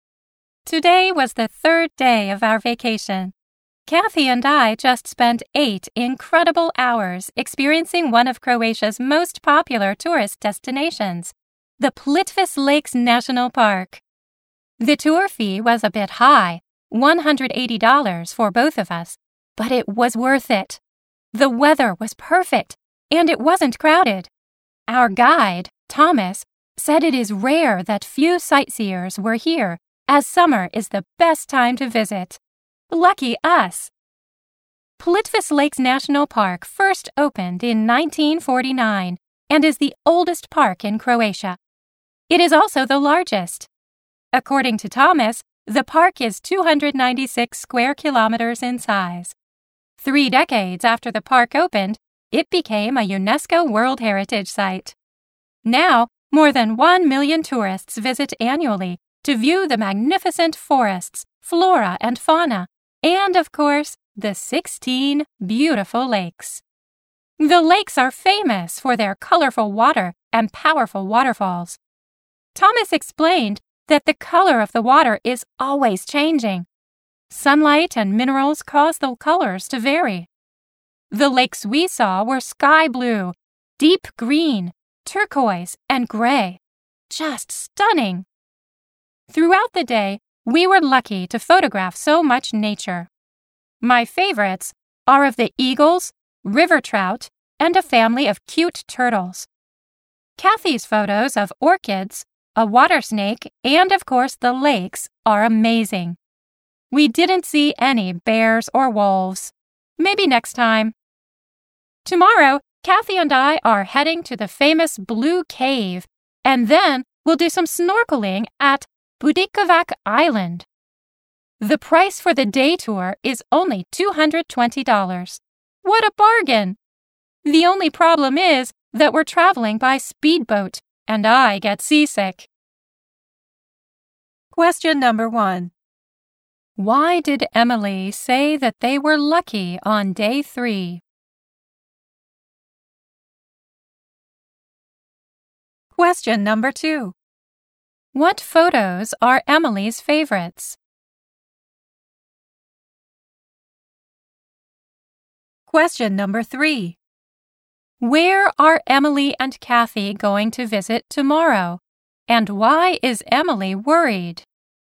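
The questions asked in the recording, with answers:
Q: Why did Emily say that they were lucky on day three?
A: The weather was perfect and it wasn't crowded (few sightseers).

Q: What photos are Emily's favorites?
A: Her photos of the eagles, river trout, and a family of cute turtles.

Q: Where are Emily and Kathy going to visit tomorrow? And why is Emily worried?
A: The Blue Cave and Budikovac Island; she gets seasick on the speedboat.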